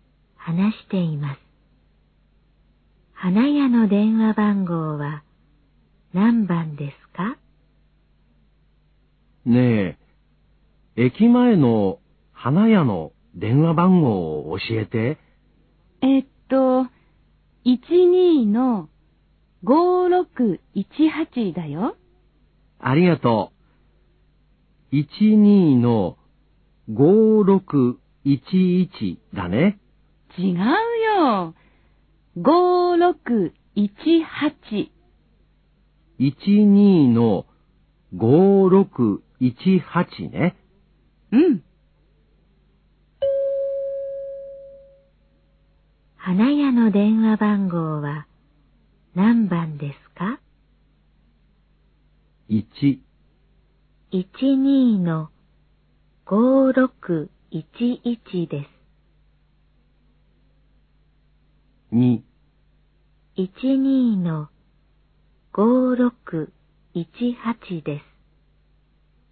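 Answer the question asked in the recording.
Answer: 2: 12-5618です。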